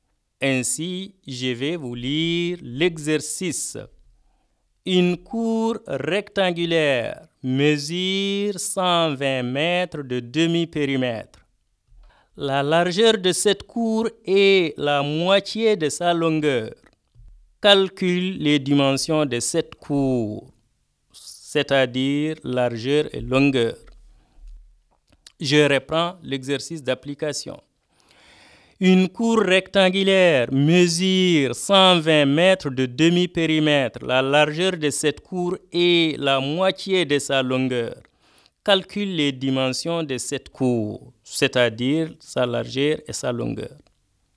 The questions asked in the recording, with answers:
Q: Calcule les dimensions de cette cour, c'est-à-dire sa largeur et sa longueur.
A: Donc, la longueur est égale à 80 mètres, la largeur est égale à 40 mètres